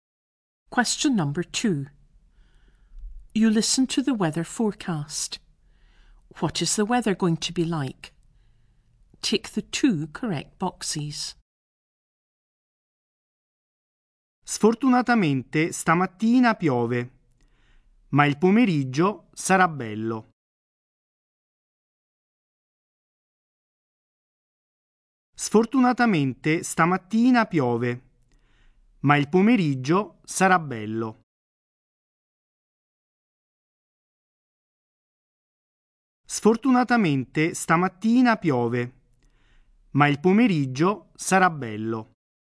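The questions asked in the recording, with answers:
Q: What is the weather going to be like?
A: Rainy this morning, fine in the afternoon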